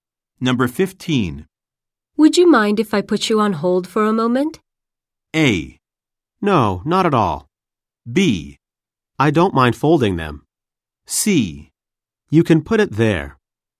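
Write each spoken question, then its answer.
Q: Would you mind if I put you on hold for a moment?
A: A: No, not at all.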